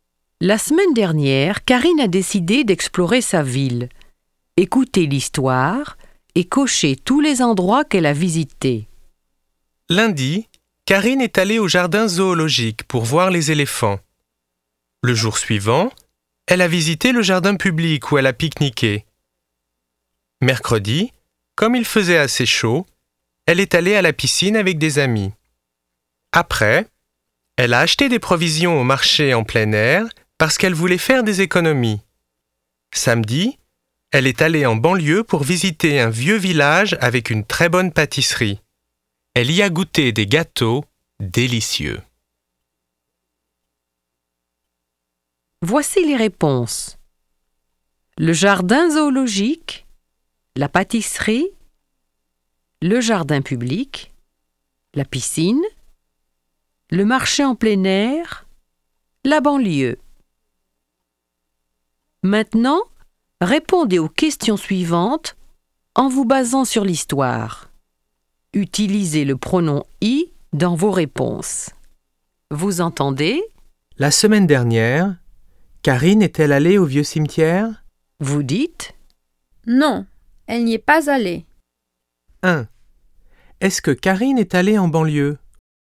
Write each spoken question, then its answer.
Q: Est-ce que Karine est allée en banlieue ?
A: Oui, elle y est allée.